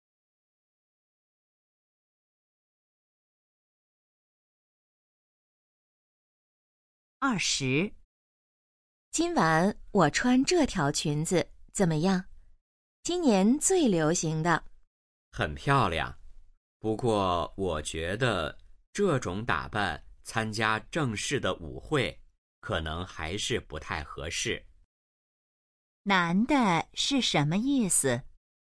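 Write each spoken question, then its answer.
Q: 男的是什么意思?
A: 这条裙子不适合参加正式舞会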